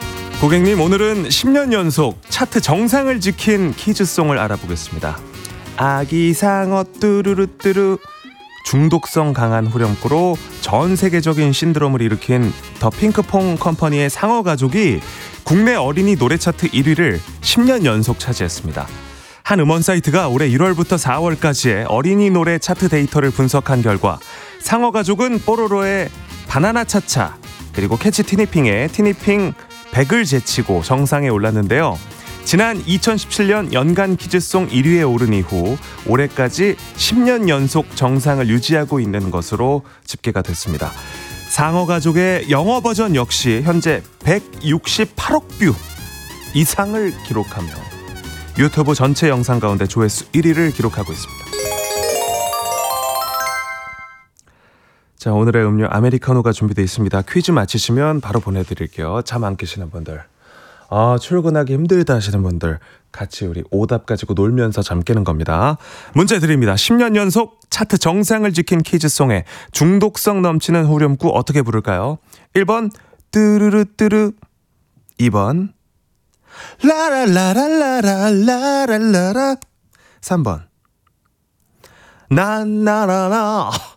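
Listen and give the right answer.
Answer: 1: 뚜루루뚜루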